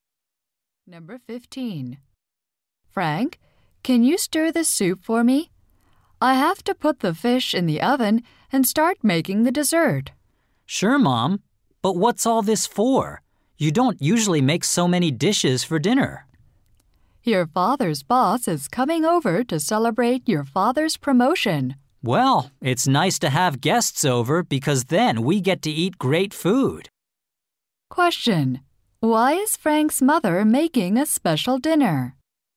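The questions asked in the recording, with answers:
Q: Why is Frank's mother making a special dinner?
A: To celebrate his father's promotion with his boss.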